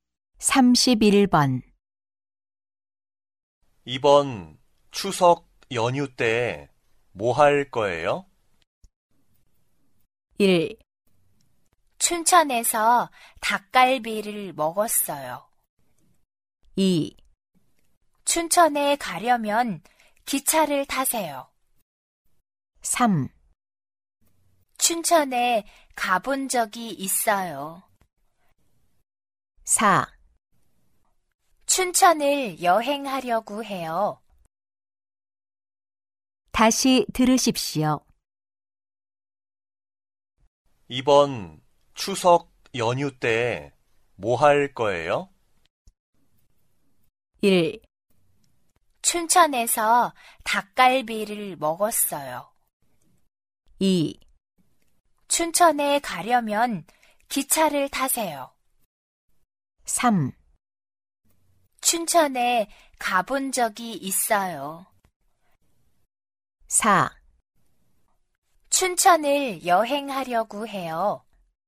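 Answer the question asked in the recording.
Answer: 4: 춘천을 여행하려고 해요.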